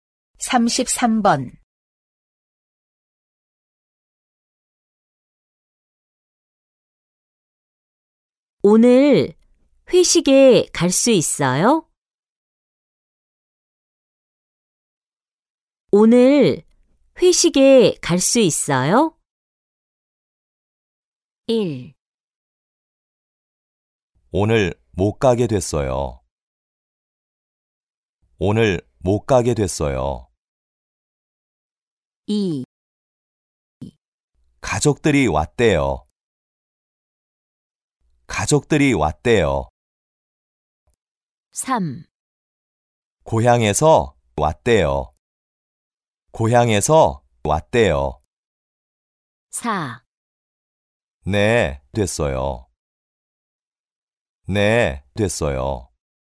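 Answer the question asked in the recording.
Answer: 1: 오늘 못 가게 됐어요.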